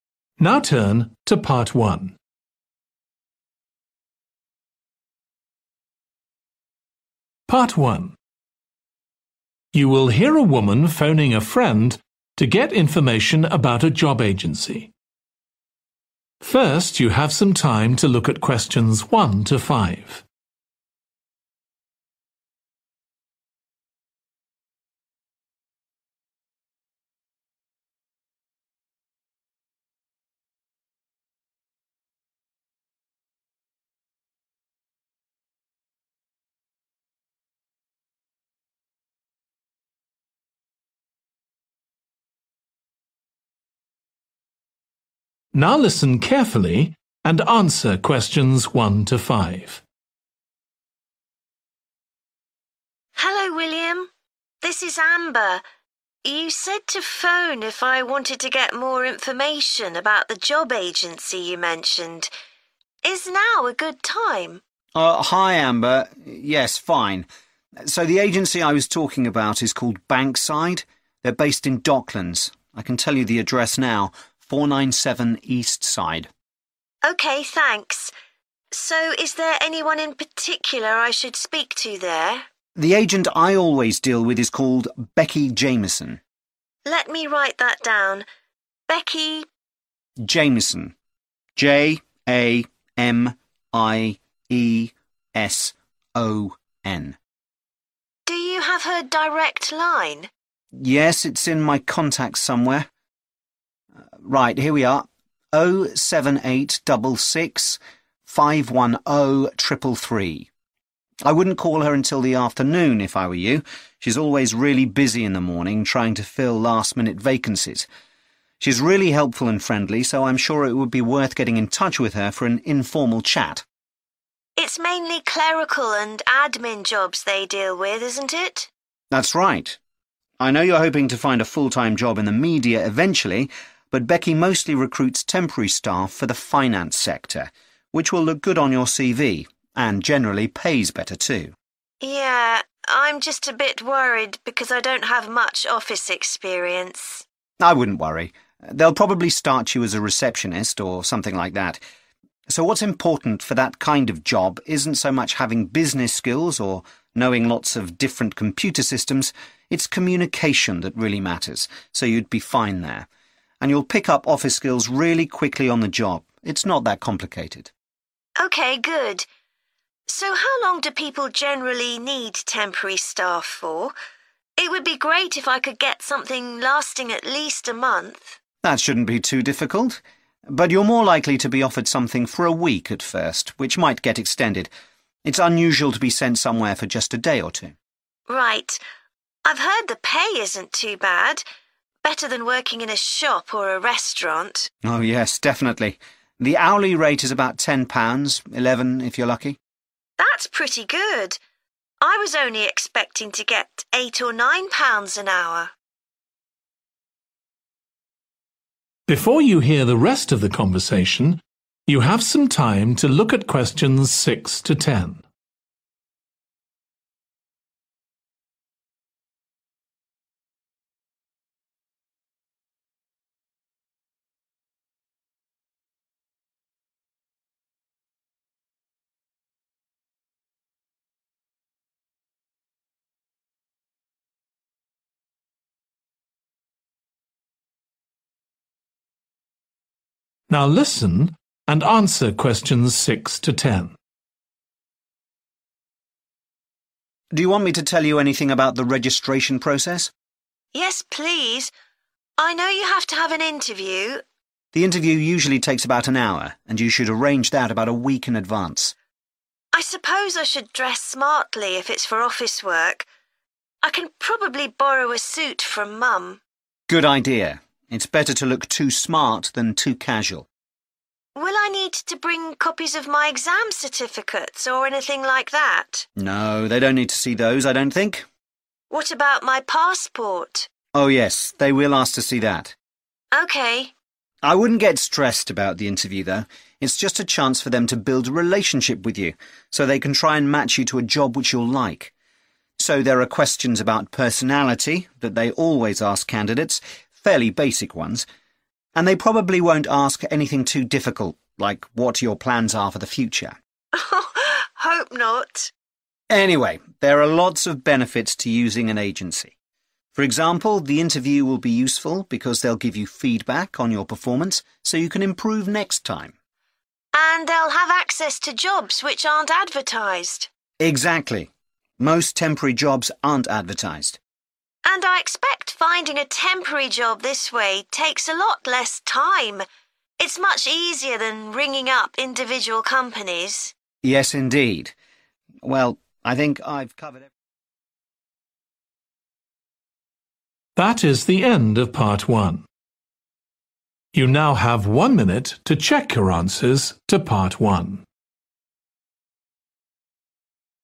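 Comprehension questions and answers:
Complete the notes below. Write ONE WORD AND/OR A NUMBER for each answer.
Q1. Name of agent: Becky 1...............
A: Jamieson

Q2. Best to call her in the 2...............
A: afternoon

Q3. Must have good 3.................. skills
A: communication

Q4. Jobs are usually for at least one 4....................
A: week

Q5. Pay is usually 5 £................. per hour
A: 10

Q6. Wear a 6................... to the interview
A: suit

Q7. Must bring your 7.................... to the interview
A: passport

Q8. They will ask questions about each applicant's 8...................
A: personality

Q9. The 9................... you receive at interview will benefit you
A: feedback

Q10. Less 10.................. is involved in applying for jobs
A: time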